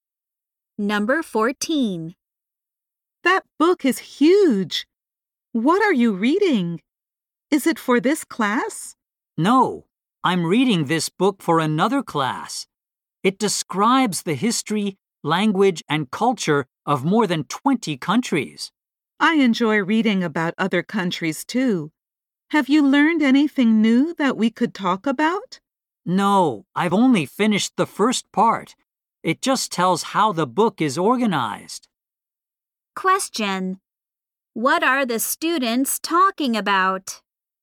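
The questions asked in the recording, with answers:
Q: What are the students talking about?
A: A book about the history, language, and culture of other countries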